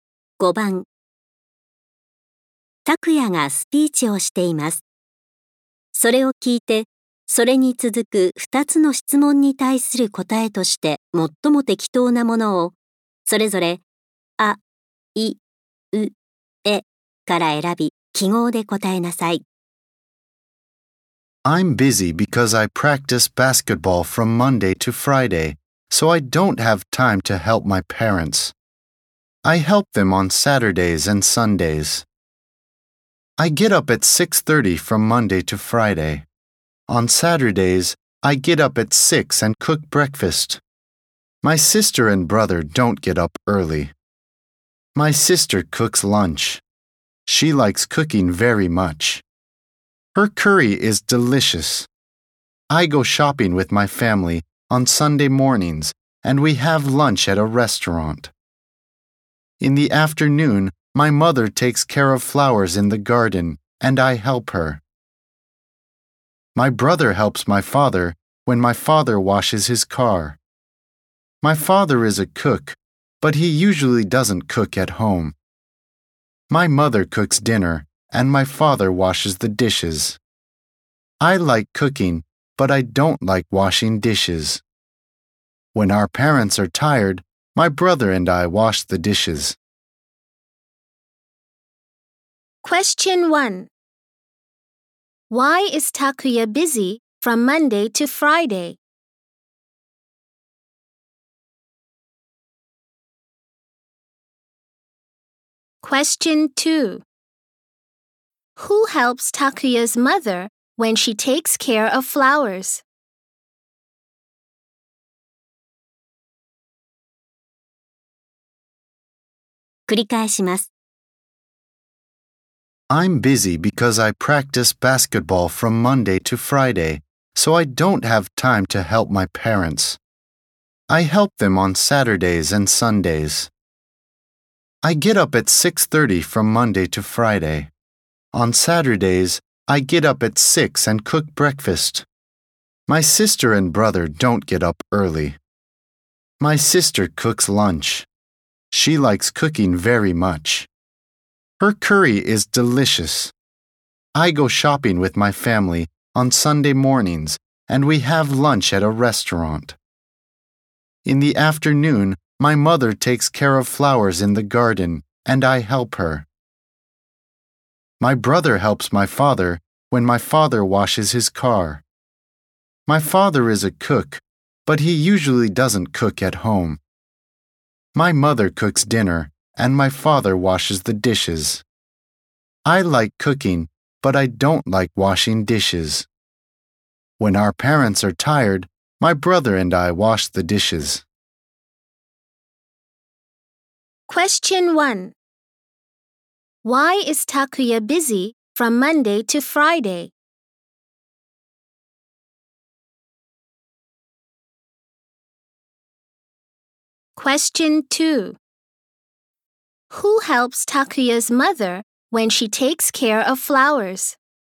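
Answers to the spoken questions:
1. Because he practices basketball.
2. Takuya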